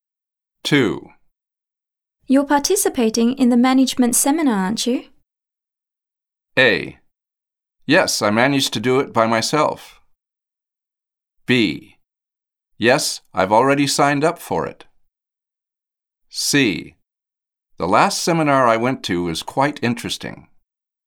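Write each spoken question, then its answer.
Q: You're participating in the management seminar, aren't you?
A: B: Yes, I've already signed up for it.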